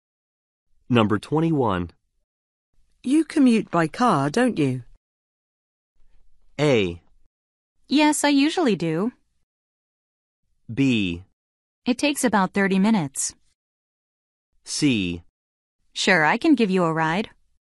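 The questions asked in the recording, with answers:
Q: You commute by car, don't you?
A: A: Yes, I usually do.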